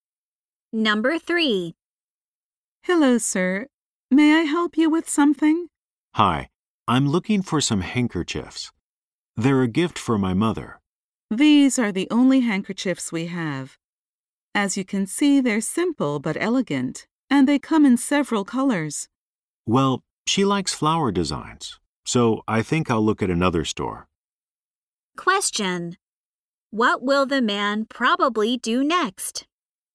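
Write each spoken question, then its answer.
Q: What will the man probably do next?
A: Go to another store.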